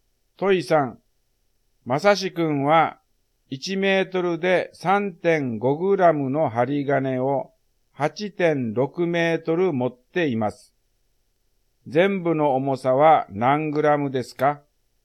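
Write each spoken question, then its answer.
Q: 全部の重さは何グラムですか?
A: 30.1グラム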